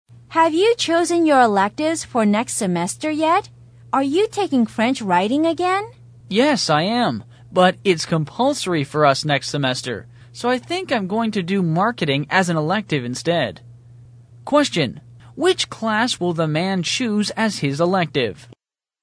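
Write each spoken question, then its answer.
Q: which class will the man choose as his elective?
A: Marketing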